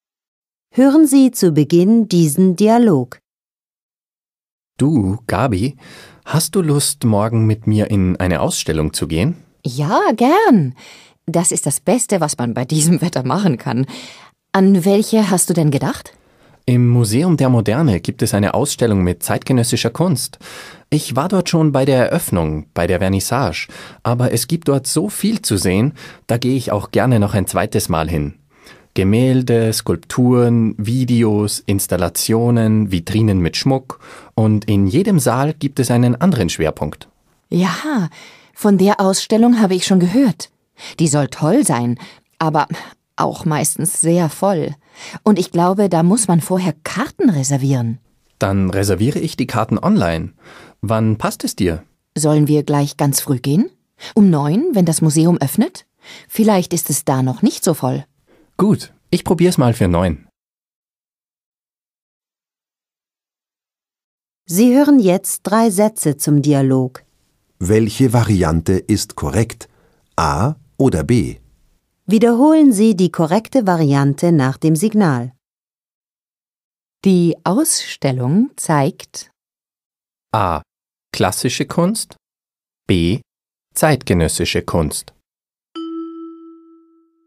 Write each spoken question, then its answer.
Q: Die Ausstellung zeigt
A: B. Die Ausstellung zeigt zeitgenössische Kunst.